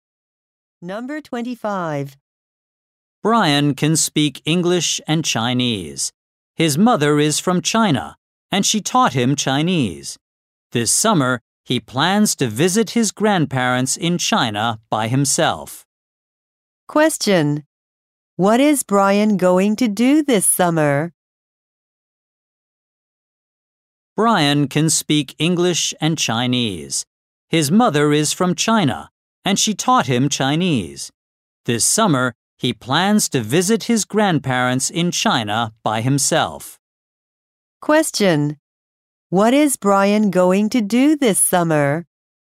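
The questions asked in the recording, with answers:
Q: What is Brian going to do this summer?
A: Visit his grandparents in China by himself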